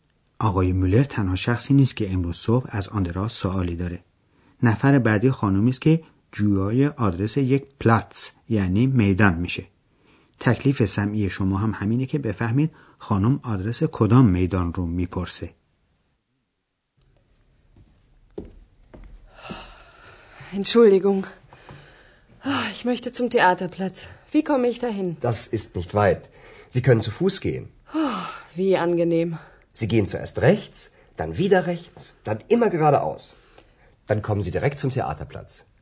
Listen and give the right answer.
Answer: پس میدان مورد نظر خانم میدان تئاتر بود.